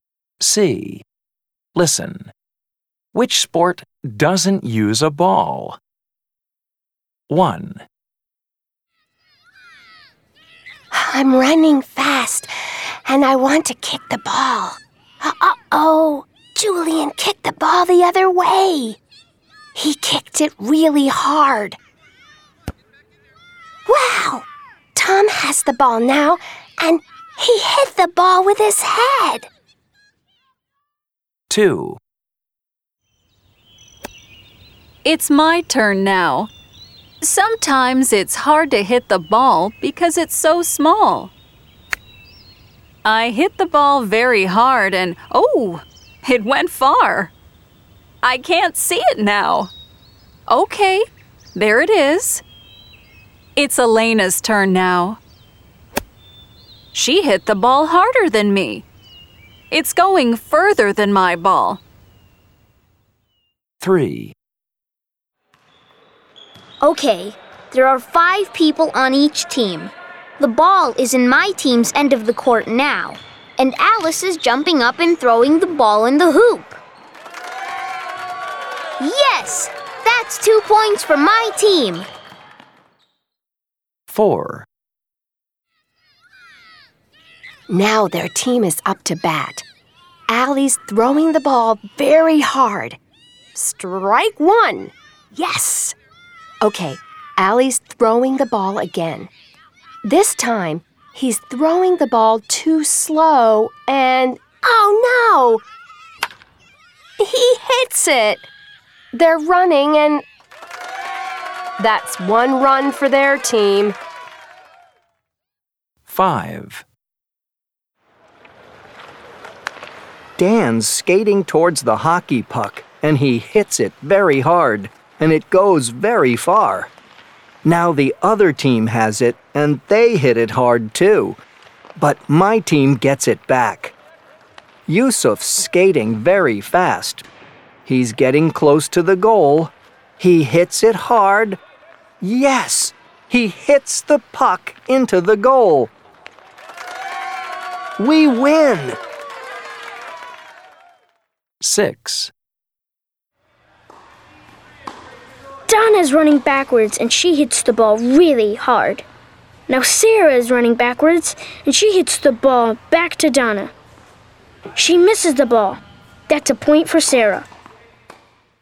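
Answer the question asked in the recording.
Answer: Hockey (number 5)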